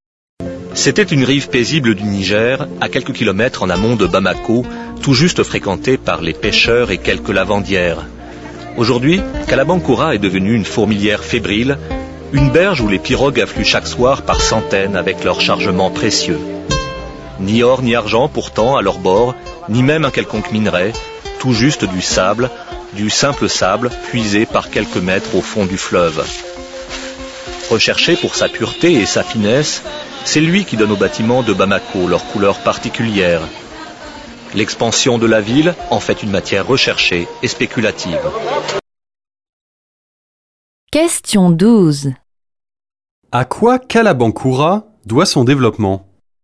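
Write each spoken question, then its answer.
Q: À quoi Kalabankura doit son développement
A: À l'extraction et au commerce du sable du fleuve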